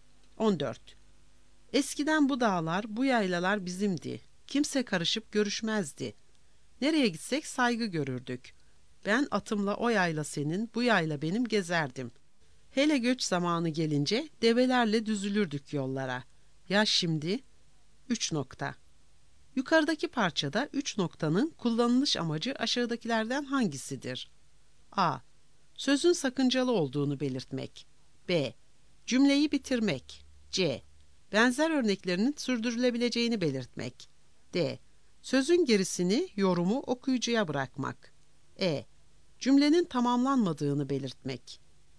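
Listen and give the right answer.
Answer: D: Sözün gerisini, yorumu okuyucuya bırakmak.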